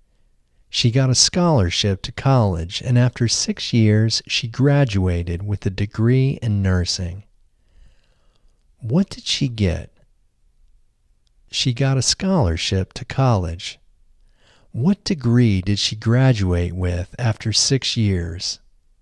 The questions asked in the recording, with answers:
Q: What degree did she graduate with after 6 years?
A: She graduated with a degree in nursing after 6 years.